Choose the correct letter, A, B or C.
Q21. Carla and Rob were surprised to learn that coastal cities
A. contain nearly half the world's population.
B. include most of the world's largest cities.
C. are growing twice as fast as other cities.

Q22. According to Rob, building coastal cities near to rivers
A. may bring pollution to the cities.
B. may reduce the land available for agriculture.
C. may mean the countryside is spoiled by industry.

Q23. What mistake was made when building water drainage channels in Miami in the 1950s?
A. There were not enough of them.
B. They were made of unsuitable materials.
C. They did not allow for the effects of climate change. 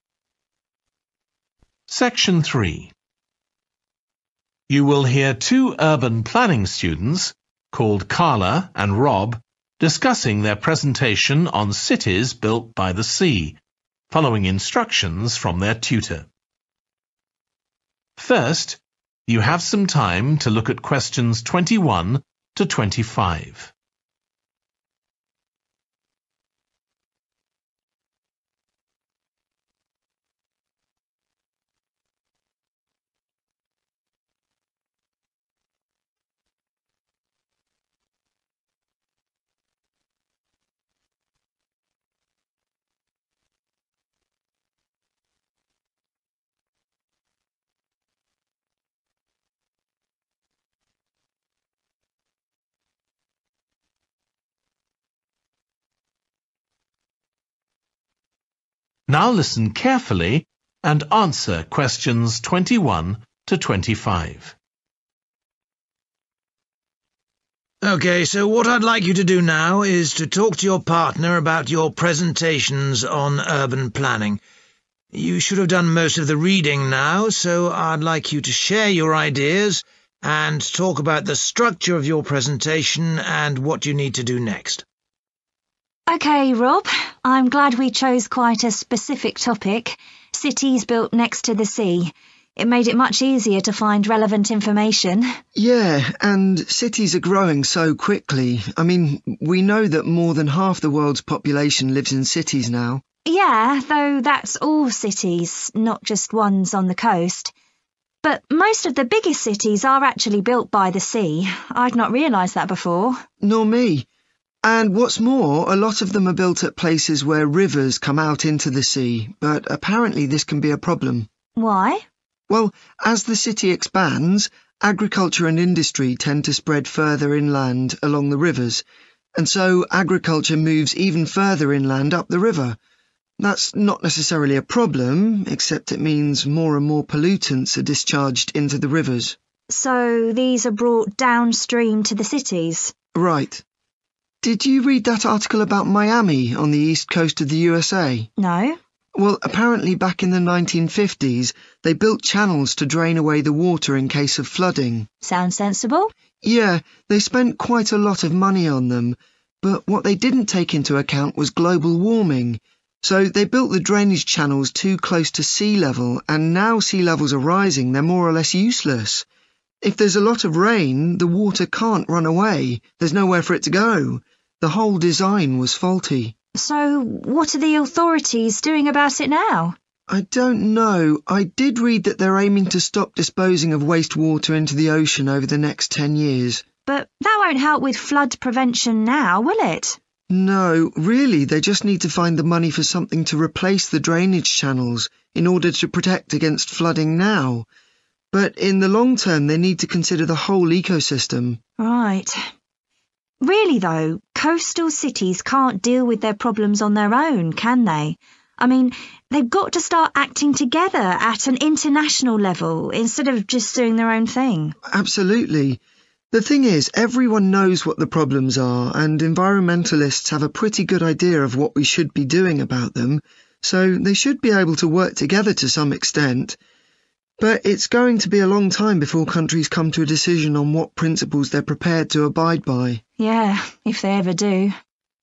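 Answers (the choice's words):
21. include most of the world's largest cities.
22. may bring pollution to the cities.
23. They did not allow for the effects of climate change.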